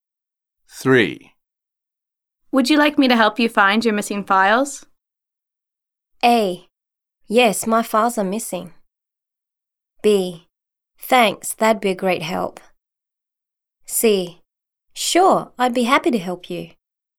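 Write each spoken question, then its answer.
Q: Would you like me to help you find your missing files?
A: B: Thanks, that'd be a great help.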